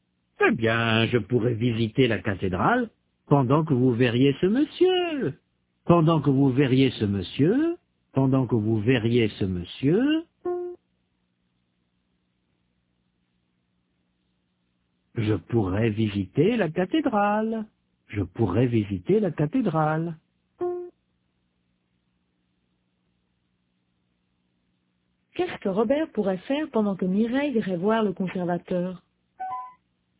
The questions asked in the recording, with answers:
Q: Qu'est-ce que Robert pourrait faire pendant que Mireille irait voir le conservateur?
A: Il pourrait visiter la cathédrale.